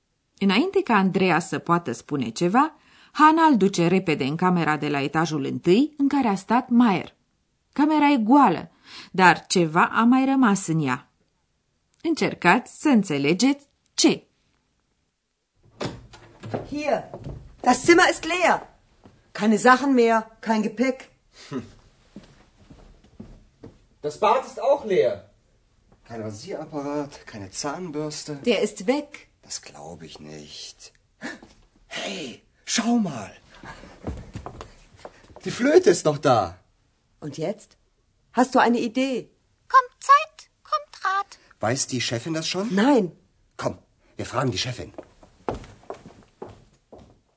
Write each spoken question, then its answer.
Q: Camera e goală, dar ceva a mai rămas în ea.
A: Singurul lucru rămas în camera goală este flautul domnului Maier.